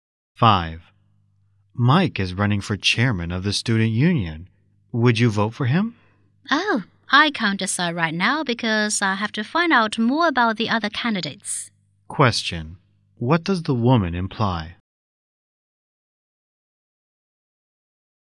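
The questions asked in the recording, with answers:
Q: What does the woman imply?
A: She hasn't decided whether to vote for Mike yet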